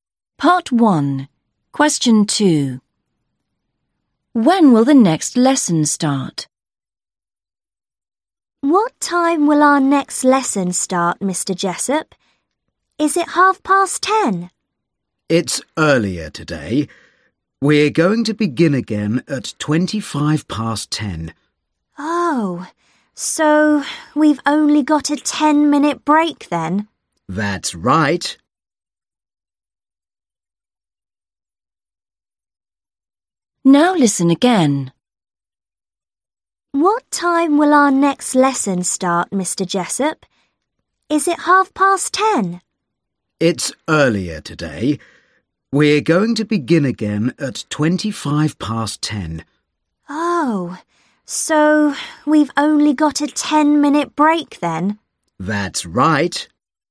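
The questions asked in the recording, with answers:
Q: When will the next lesson start?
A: 10:25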